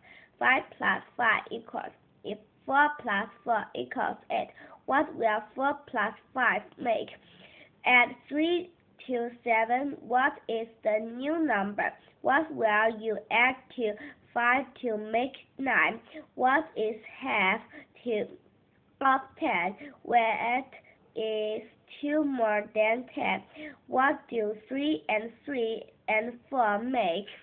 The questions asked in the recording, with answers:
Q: What will 4 + 5 make?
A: 4 and 5 make 9

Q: What will you add to 5 to make 9?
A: 5, 6, 7, 8, 9, and 4 more.

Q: What is half to of 10?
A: 5 is half of 10, because 5 + 5 = 10.

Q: What is 2 more than 10?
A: 10, 11, 12.

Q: What do 3 and 3 and 4 make?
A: 3 and 3 make 6. 6 and 4 more make 10.